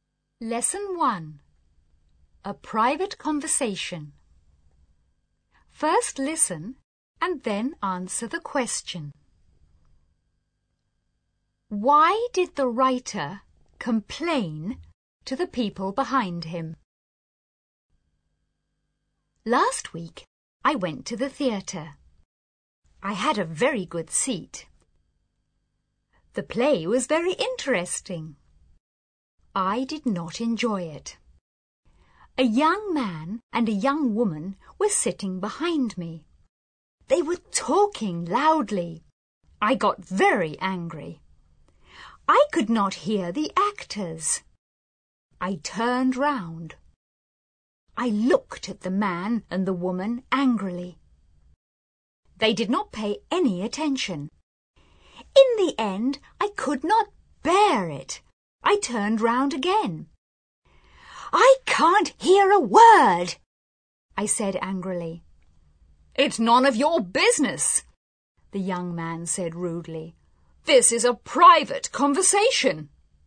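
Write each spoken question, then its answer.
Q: Why did the writer complain to the people behind him?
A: Because they were talking loudly and he could not hear the actors.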